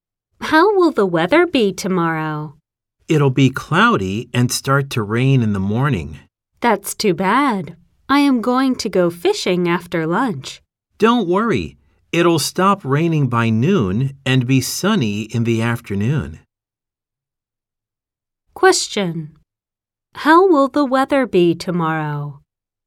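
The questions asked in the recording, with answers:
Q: How will the weather be tomorrow?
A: Cloudy with rain in the morning, then sunny in the afternoon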